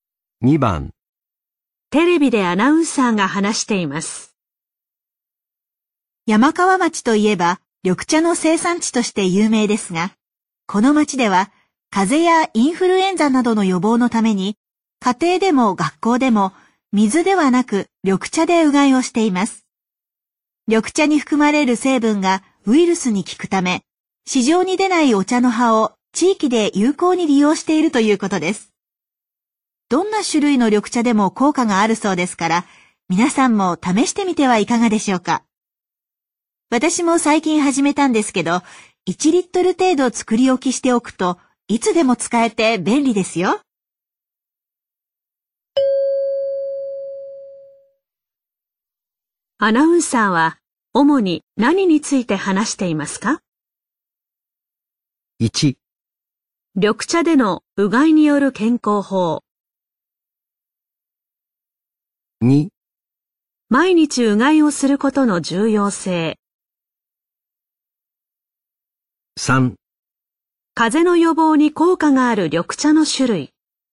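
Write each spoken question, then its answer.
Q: アナウンサーは主に何について話していますか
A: 1: 緑茶でのうがいによる健康法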